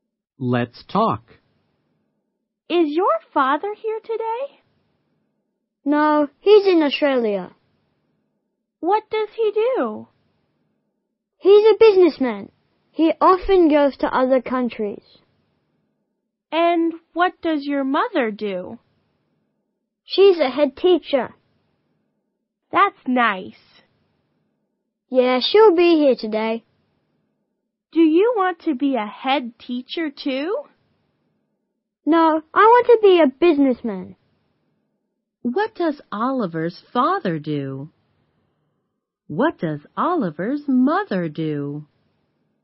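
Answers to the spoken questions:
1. He's a businessman.
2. She's a head teacher.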